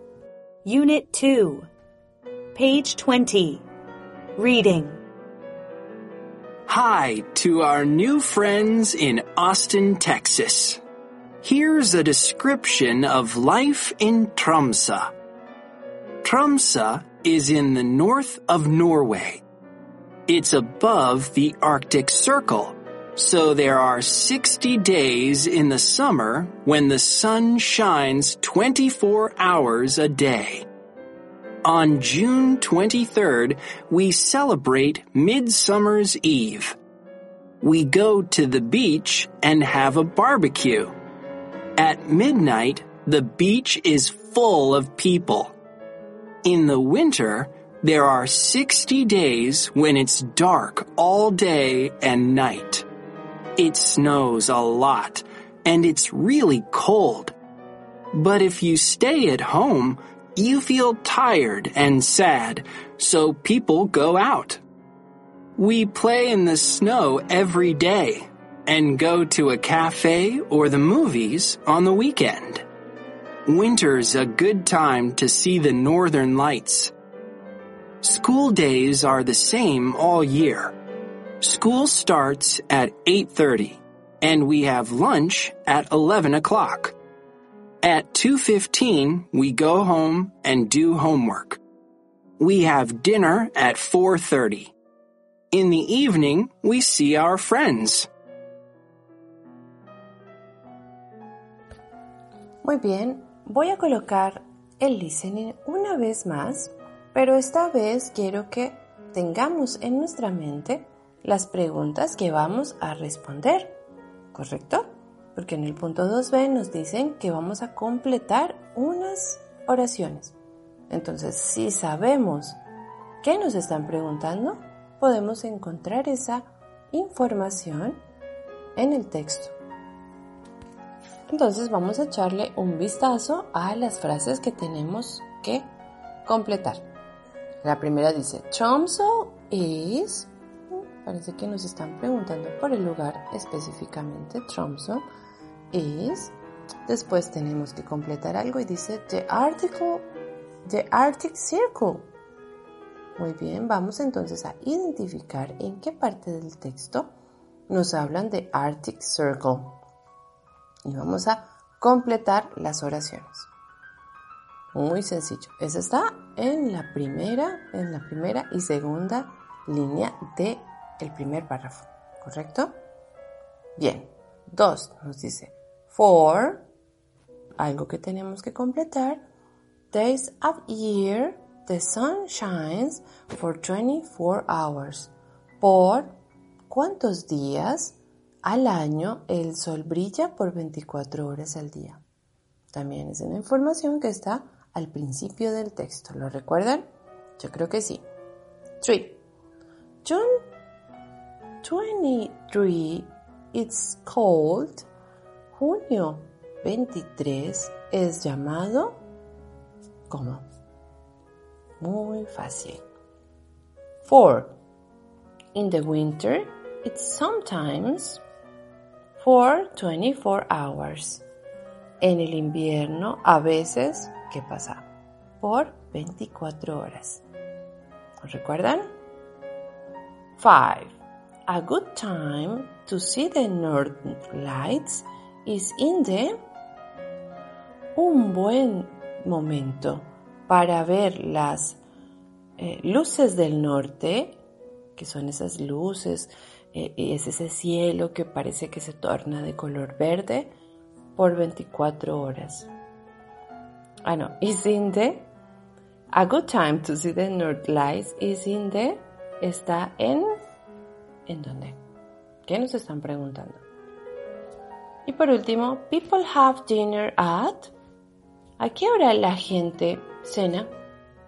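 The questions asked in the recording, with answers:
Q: Tromsø is, parece que nos están preguntando por el lugar específicamente, Tromsø is.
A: above (the Arctic Circle)

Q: for, algo que tenemos que completar, days of year, the sun shines for 24 hours.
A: 60

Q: A good time to see the northern lights is in the...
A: winter

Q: people have dinner at...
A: 4:30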